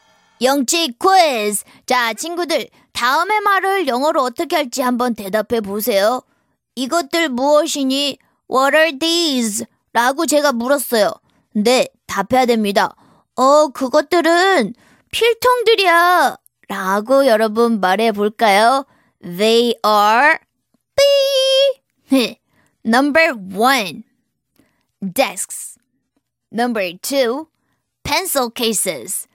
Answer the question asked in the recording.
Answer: 정답은 number two. Pencil cases.